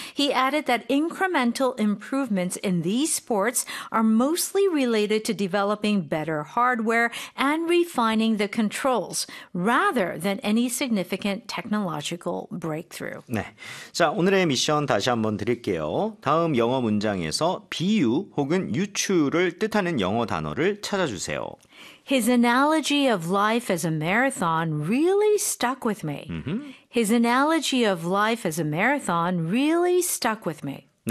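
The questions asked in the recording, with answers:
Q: 다음 영어 문장에서 비유 혹은 유추를 뜻하는 영어 단어를 찾아주세요.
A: analogy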